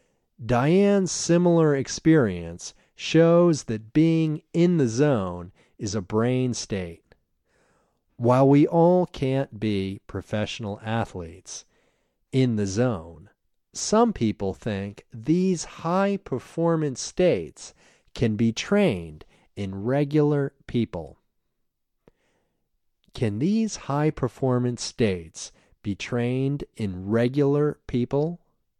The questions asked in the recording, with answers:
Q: Can these high-performance states be trained in regular people?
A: Yes, these high-performance states can be trained in regular people.